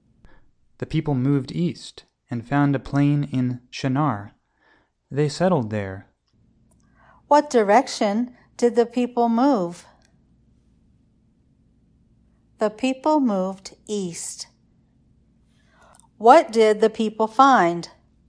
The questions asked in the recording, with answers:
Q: What did the people find?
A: The people found a plain.